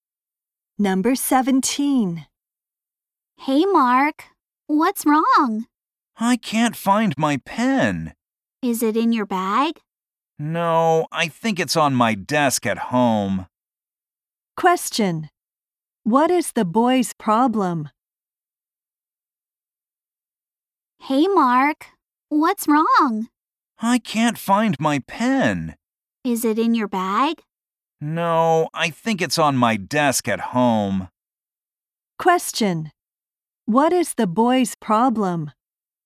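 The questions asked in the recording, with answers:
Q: What is the boy's problem?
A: He can't find his pen.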